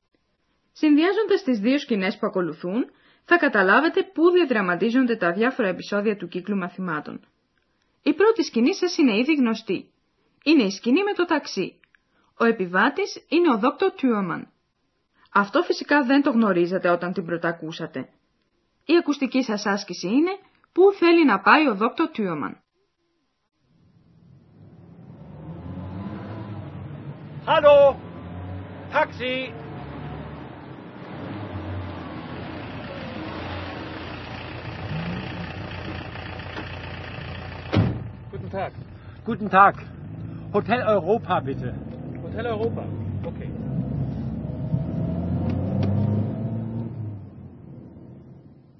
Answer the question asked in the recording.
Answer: Ο Dr. Thürmann ήθελε να τον μεταφέρει το ταξί στο ξενοδοχείο Ευρώπη.